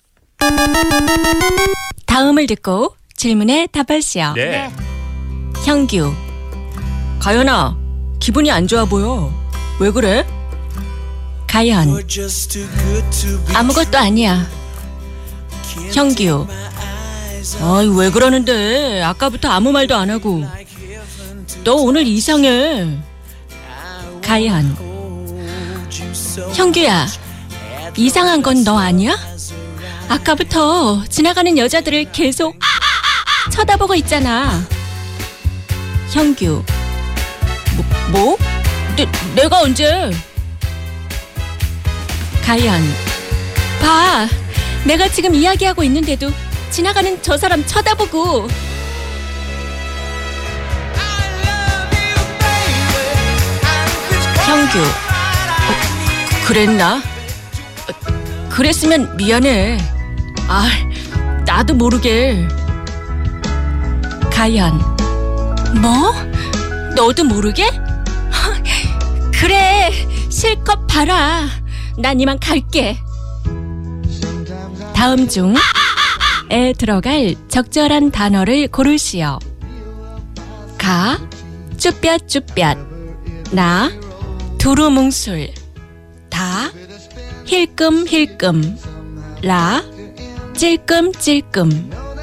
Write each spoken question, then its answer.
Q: 다음 중에 들어갈 적절한 단어를 고르시오.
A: 다 아까부터 지나가는 여자들을 힐끔힐끔 쳐다보고 있잖아.